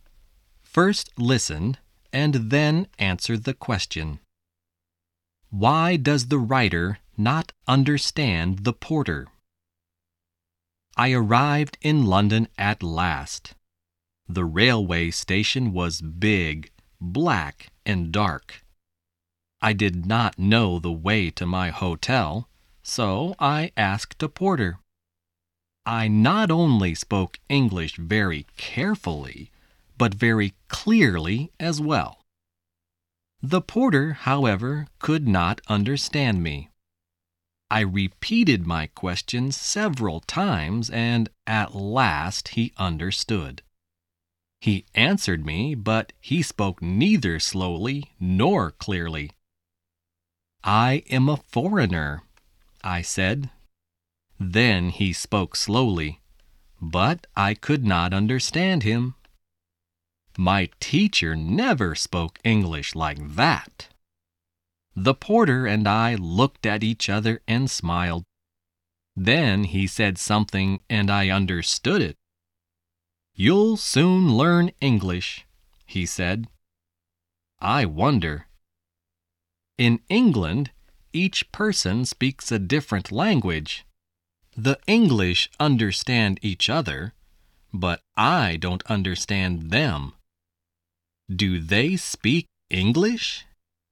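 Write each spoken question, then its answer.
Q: Why does the writer not understand the porter?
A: Because the porter spoke neither slowly nor clearly, and even when he spoke slowly his English was not like the English the writer's teacher spoke.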